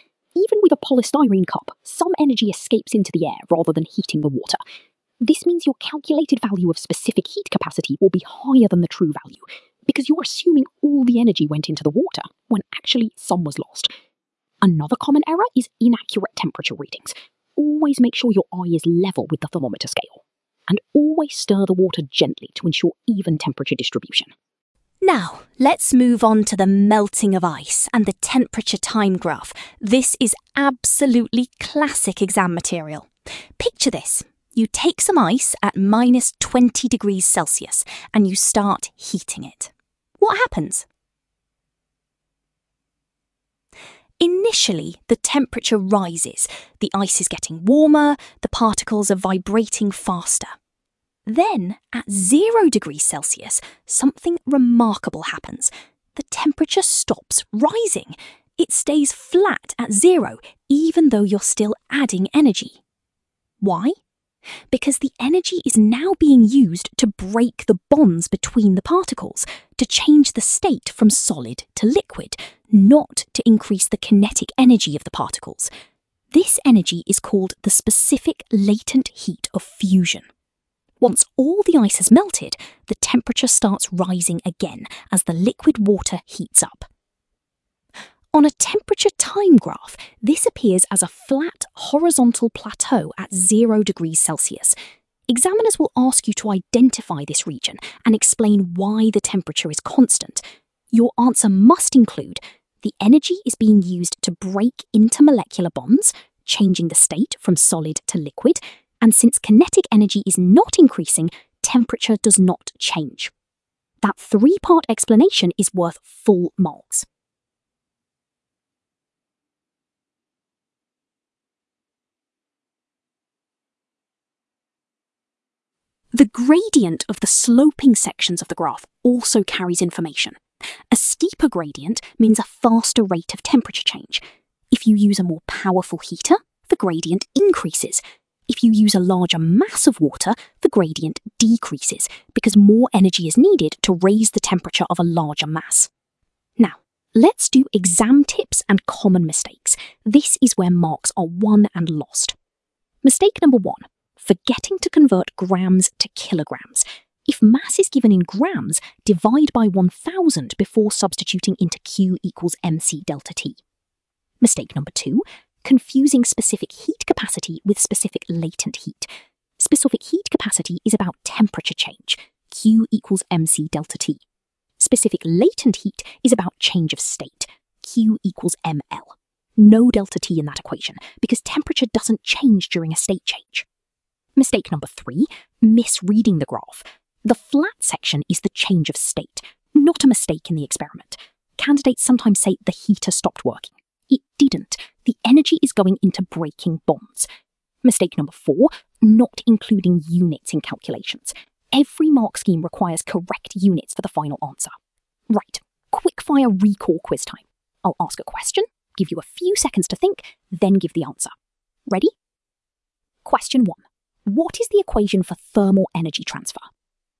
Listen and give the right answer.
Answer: Q equals mc delta T.